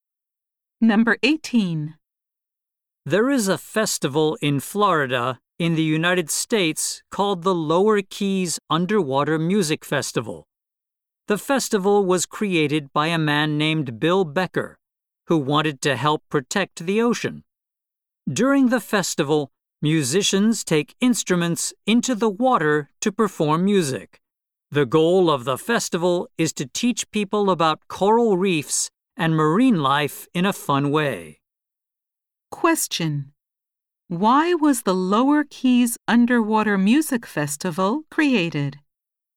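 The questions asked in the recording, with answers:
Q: Why was the Lower Keys Underwater Music Festival created?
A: To help protect the ocean by teaching people about coral reefs and marine life.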